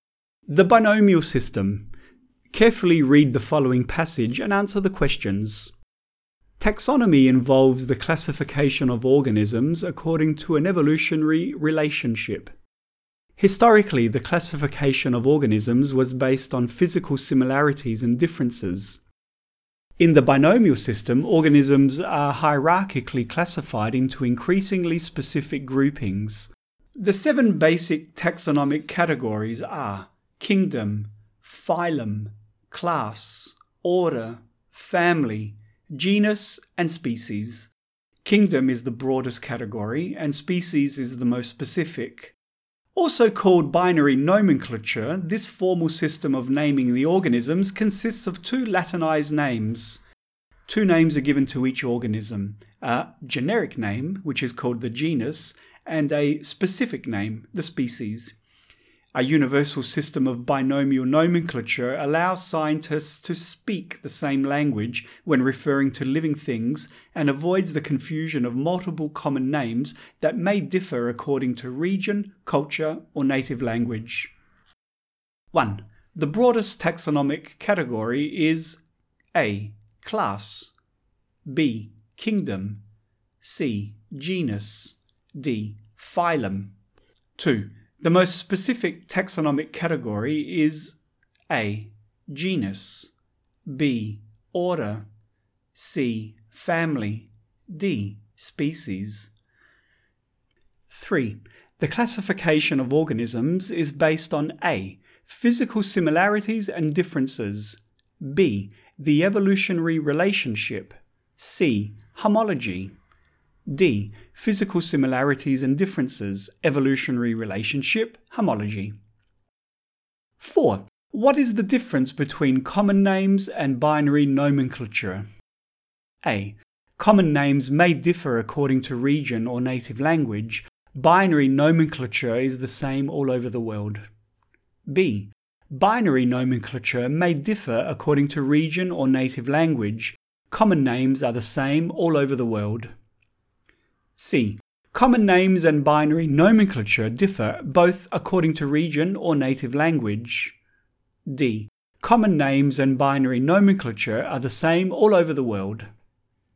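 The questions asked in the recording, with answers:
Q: The broadest taxonomic category is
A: B: Kingdom

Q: The most specific taxonomic category is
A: D: Species

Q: What is the difference between common names and binary nomenclature?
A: A: Common names may differ according to region or native language. Binary nomenclature is the same all over the world.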